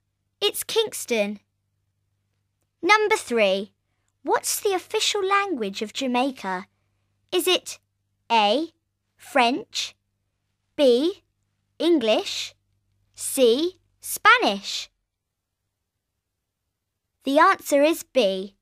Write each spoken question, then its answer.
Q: What's the official language of Jamaica?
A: The answer is B. It's English.